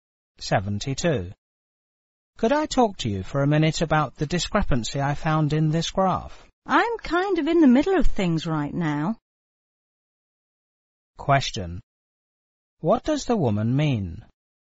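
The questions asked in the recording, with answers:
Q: What does the woman mean?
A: She is busy right now and can't talk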